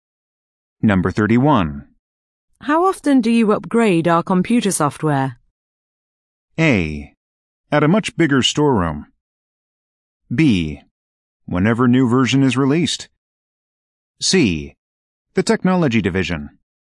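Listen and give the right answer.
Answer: B: Whenever new version is released.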